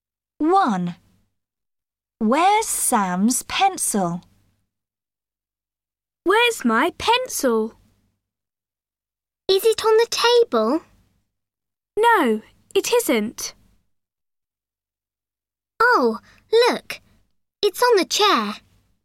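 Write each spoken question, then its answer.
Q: Where's Sam's pencil?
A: On the chair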